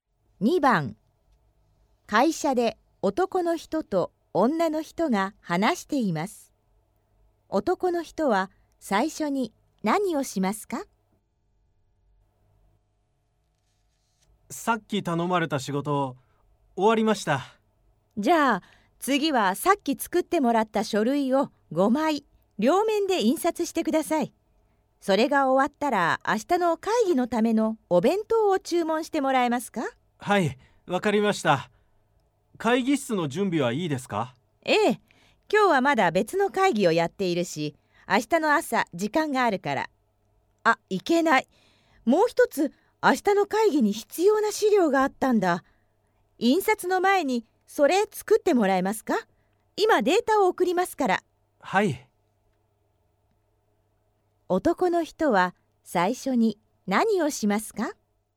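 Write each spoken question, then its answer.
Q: 男の人は最初に何をしますか?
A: 明日の会議に必要な資料を作る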